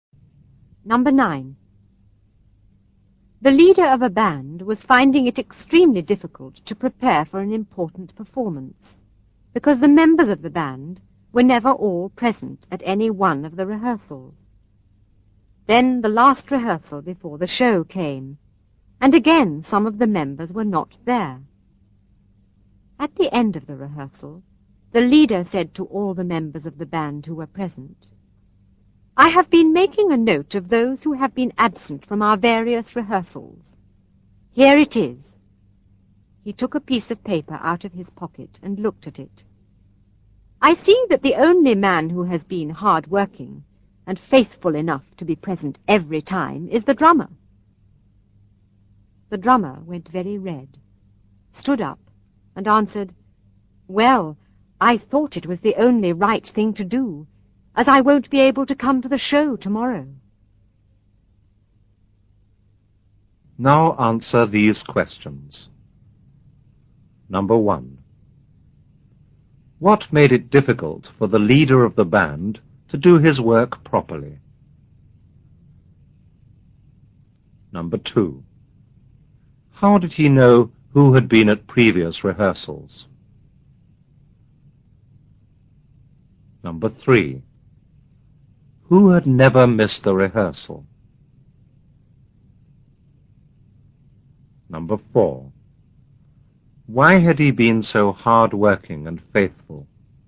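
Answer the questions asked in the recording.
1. The band members were never all present at any rehearsal
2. He had been making a note of absences on a piece of paper
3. The drummer
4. Because he would not be able to come to the show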